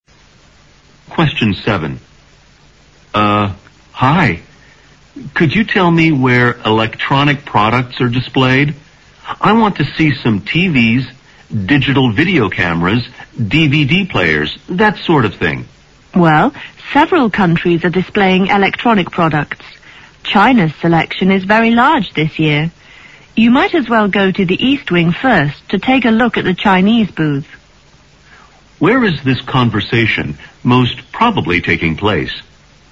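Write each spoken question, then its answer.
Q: Where is this conversation most probably taking place?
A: At an exhibition or trade fair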